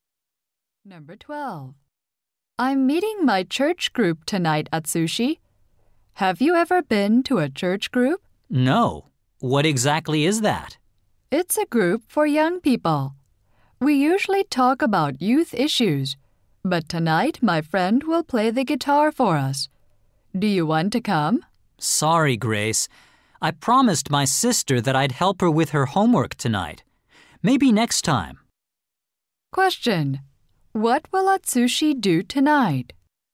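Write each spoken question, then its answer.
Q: What will Atsushi do tonight?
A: Help his sister with her homework.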